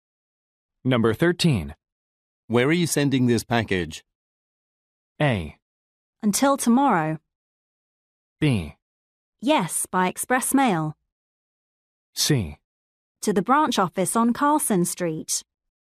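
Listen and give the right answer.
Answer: C: To the branch office on Carlson Street.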